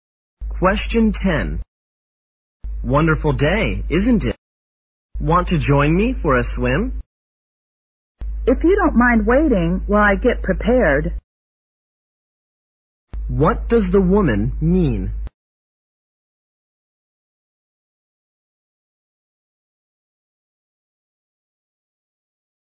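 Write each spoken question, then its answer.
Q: What does the woman mean?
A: She will join him if he waits while she gets ready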